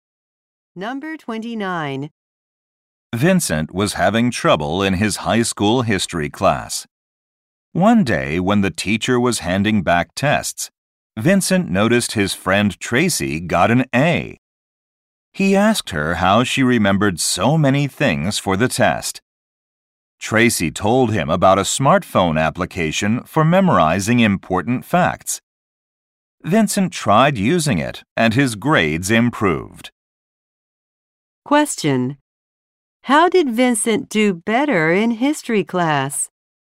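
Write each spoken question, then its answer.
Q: How did Vincent do better in history class?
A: He used a smartphone app for memorizing facts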